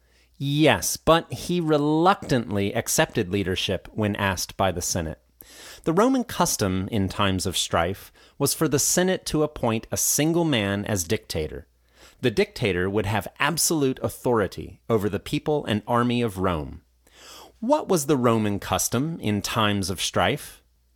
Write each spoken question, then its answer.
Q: What was the Roman custom in times of strife?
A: The Roman custom in times of strife was for the Senate to appoint a single man as dictator.